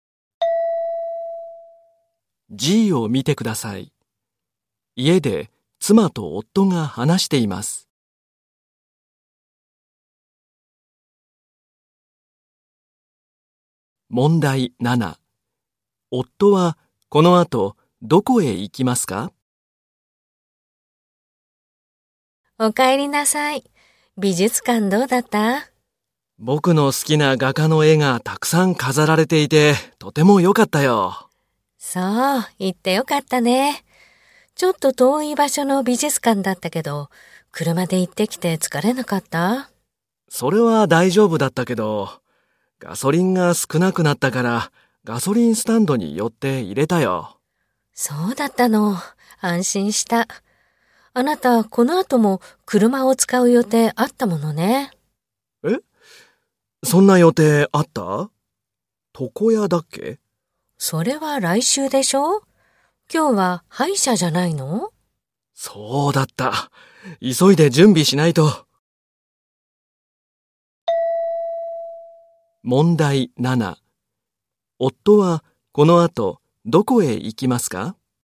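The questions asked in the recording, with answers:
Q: 夫はこの後どこへ行きますか?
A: 歯医者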